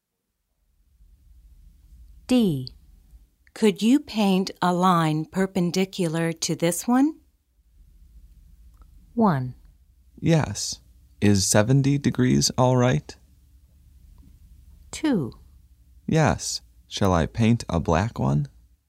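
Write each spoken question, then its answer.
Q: Could you paint a line perpendicular to this one?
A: 2: Yes. Shall I paint a black one?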